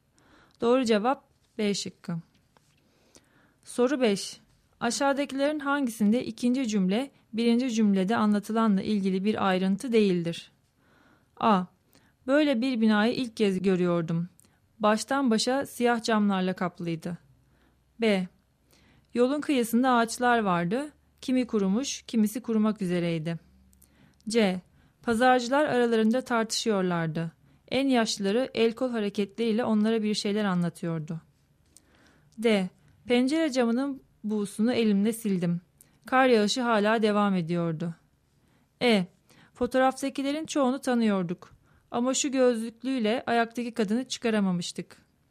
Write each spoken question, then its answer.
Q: Aşağıdakilerin hangisinde ikinci cümle, birinci cümlede anlatılanla ilgili bir ayrıntı değildir?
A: Doğru cevap D şıkkı.